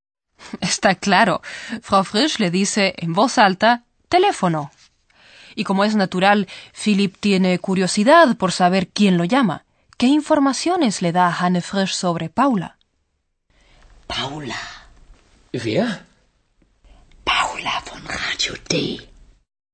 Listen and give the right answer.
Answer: Le susurra que Paula, de Radio D, está al otro lado de la línea.